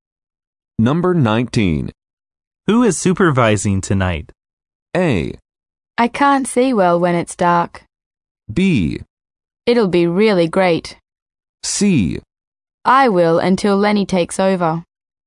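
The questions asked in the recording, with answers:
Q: Who is supervising tonight?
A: C: I will until Lenny takes over.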